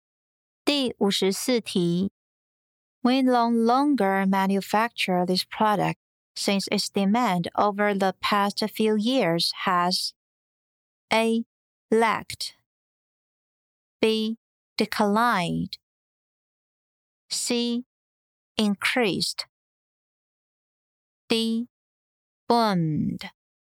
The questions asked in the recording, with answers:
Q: We no longer manufacture this product since its demand over the past few years has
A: B. Declined